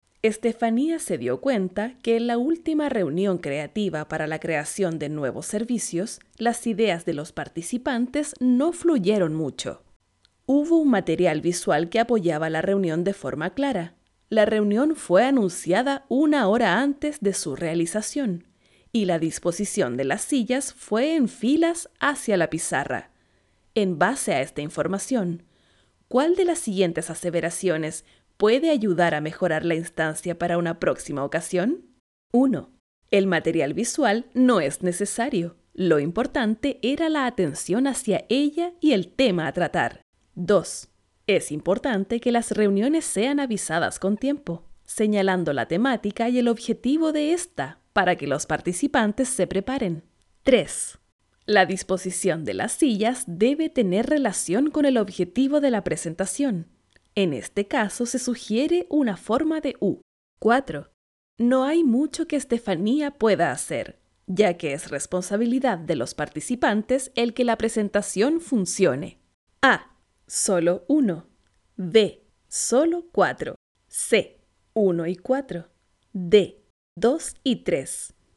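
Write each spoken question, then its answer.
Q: En base a esta información, ¿cuál de las siguientes aseveraciones puede ayudar a mejorar la instancia para una próxima ocasión?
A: D: 2 y 3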